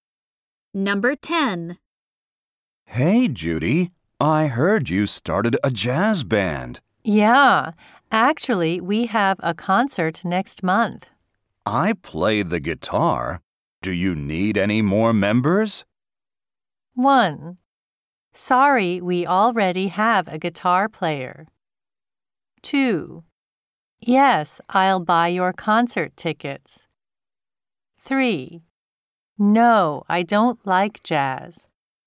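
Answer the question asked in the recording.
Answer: 1: Sorry, we already have a guitar player.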